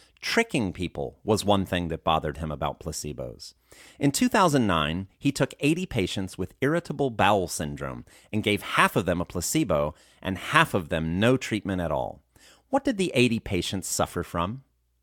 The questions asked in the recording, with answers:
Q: What did the 80 patients suffer from?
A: The 80 patients suffered from irritable bowel syndrome.